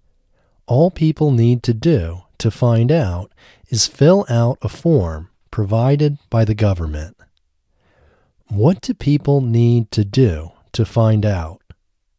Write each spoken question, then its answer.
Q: What do people need to do to find out?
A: People need to fill out a form provided by the government to find out.